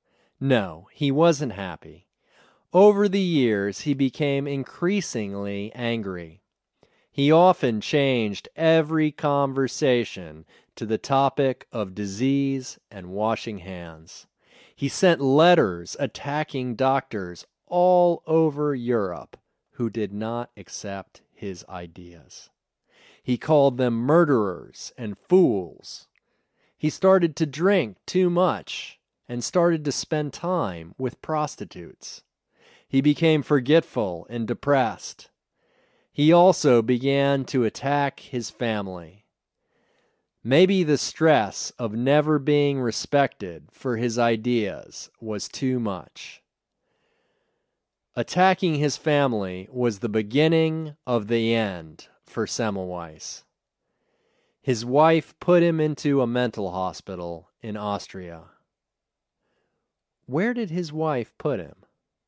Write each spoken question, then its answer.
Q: Where did his wife put him?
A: His wife put him in a mental hospital in Austria.